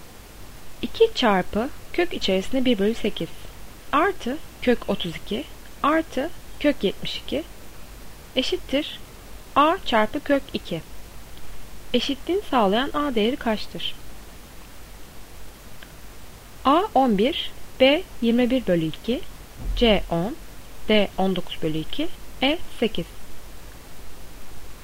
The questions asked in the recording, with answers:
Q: Eşitliğini sağlayan A değeri kaçtır?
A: Doğru cevap B 21 bölü 2.